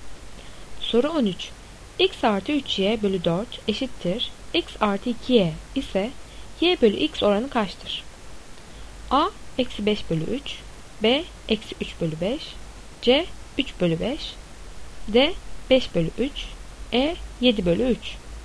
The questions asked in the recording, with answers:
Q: X artı 3y bölü 4 eşittir x artı 2y ise y bölü x oranı kaçtır?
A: Doğru cevap B eksi 3 bölü 5.